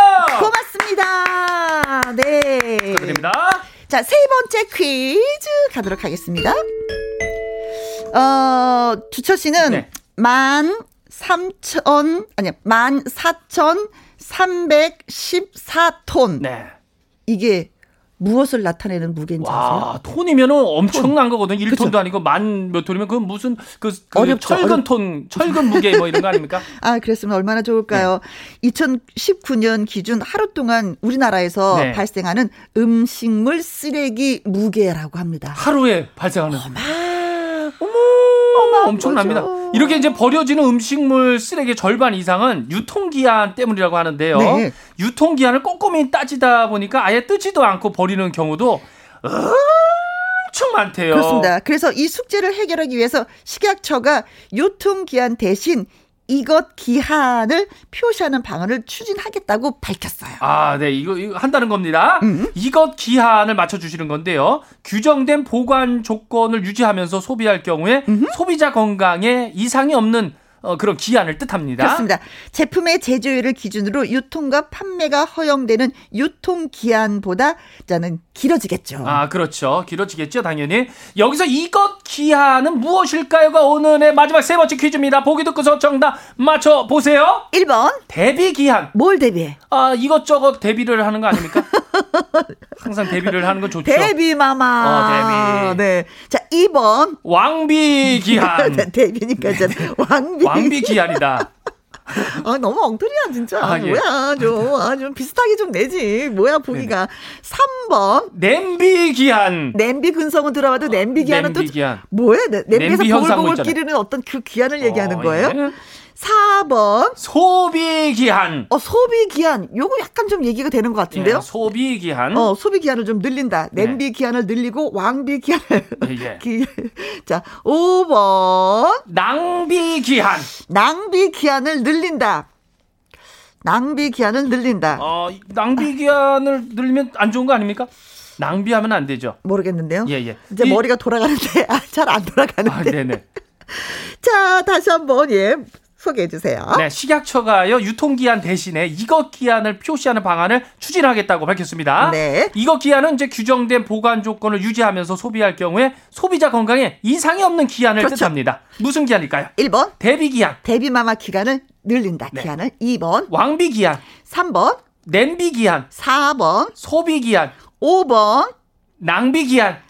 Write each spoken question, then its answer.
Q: 무슨 기한일까요?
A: 네, 소비 기한이 정답이 되겠습니다.